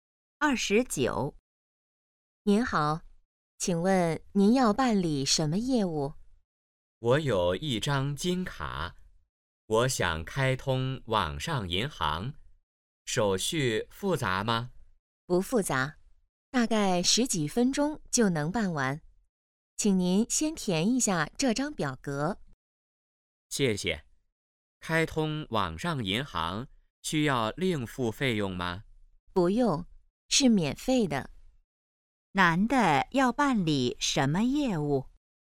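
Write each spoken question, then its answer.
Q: 男的要办理什么业务?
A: 开通网上银行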